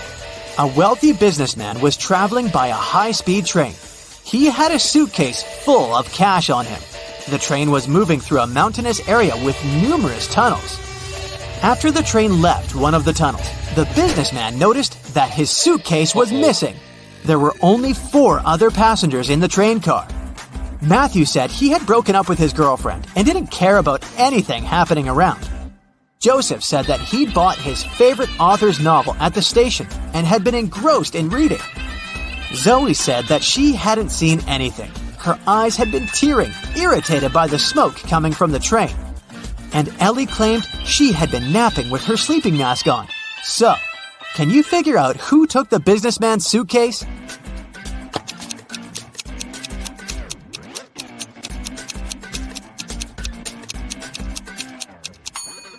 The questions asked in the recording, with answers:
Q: So, can you figure out who took the businessman's suitcase?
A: It was Zoe.